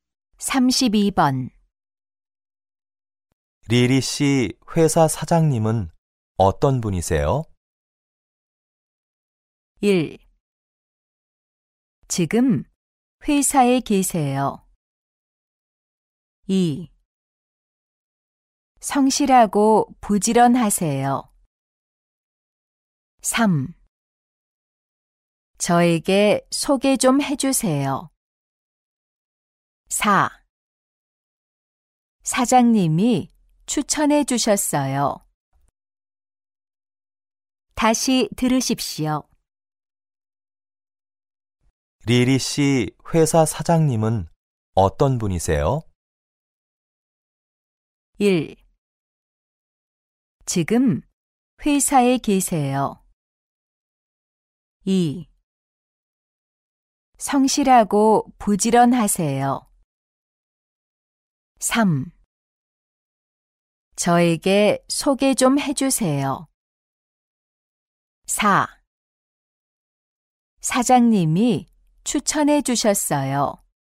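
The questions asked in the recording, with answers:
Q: 리리 씨 회사 사장님은 어떤 분이세요?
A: 2: 성실하고 부지런하세요.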